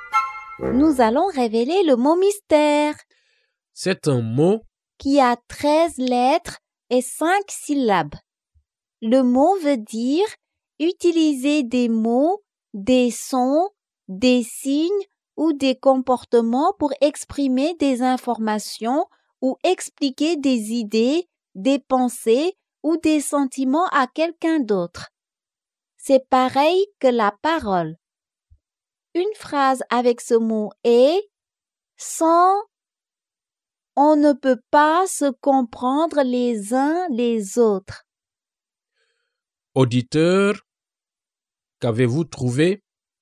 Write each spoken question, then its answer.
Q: Auditeur, qu'avez-vous trouvé?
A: Le mot mystère est communication.